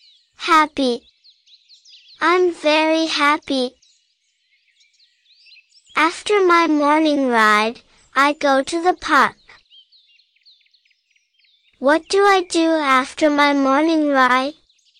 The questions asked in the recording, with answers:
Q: What do I do after my morning ride?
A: I go to the park.